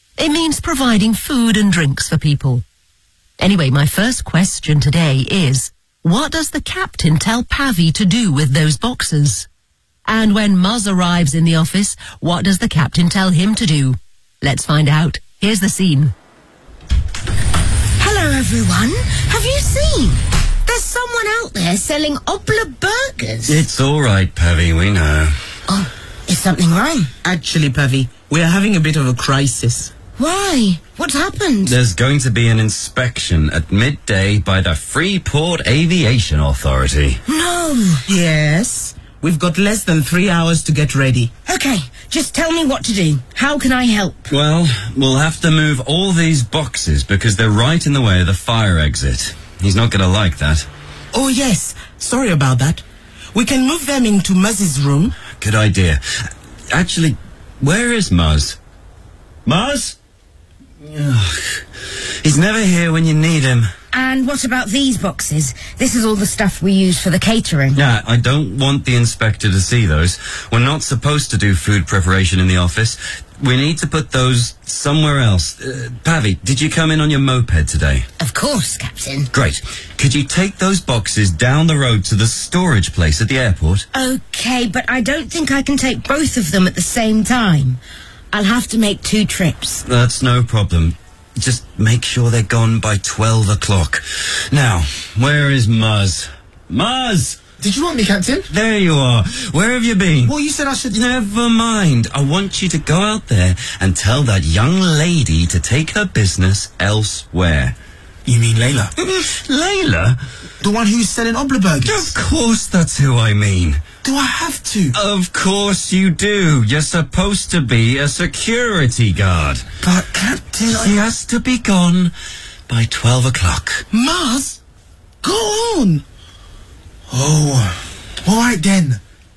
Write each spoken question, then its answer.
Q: what does the captain tell Pavi to do with those boxes?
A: Could you take those boxes down the road to the storage place at the airport?

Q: And when Muzz arrives in the office, what does the captain tell him to do?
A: I want you to go out there and tell that young lady to take her business elsewhere.